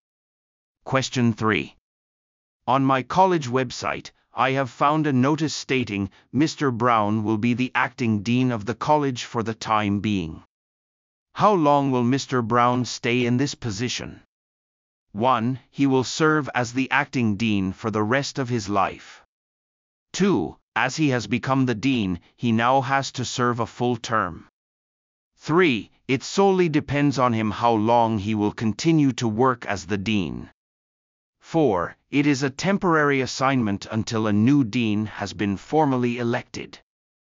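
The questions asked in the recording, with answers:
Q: How long will Mr. Brown stay in this position?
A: 4: It is a temporary assignment until a new dean has been formally elected.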